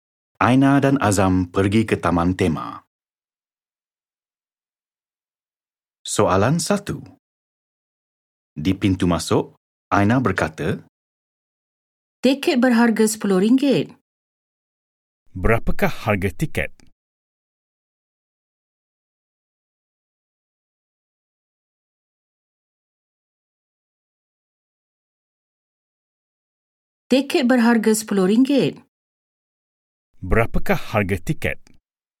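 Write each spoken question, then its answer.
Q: Berapakah harga tiket?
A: RM10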